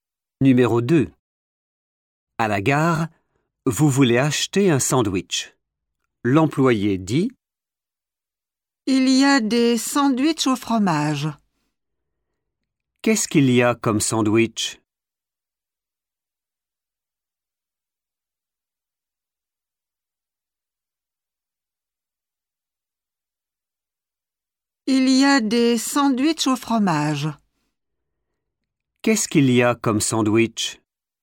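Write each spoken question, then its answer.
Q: Qu'est-ce qu'il y a comme sandwich?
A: des sandwichs au fromage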